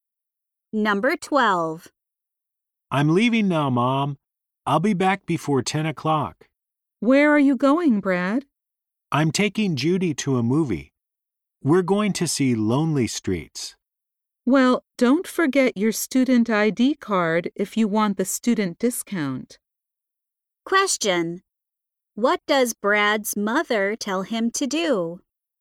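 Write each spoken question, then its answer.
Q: What does Brad's mother tell him to do?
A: Not forget his student ID card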